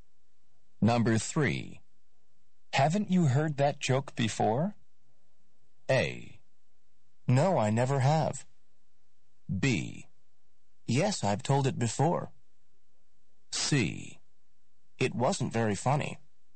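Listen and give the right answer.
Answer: A: No, I never have.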